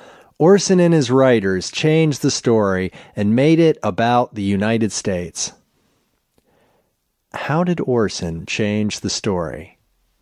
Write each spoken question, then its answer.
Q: how did Orson change the story?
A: Orson made it about the United States.